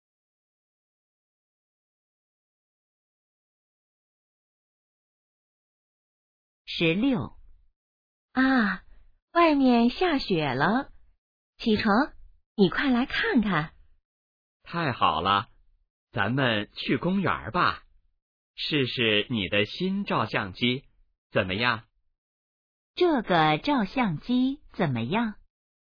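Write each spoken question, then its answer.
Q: 这个照相机怎么样?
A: 是新的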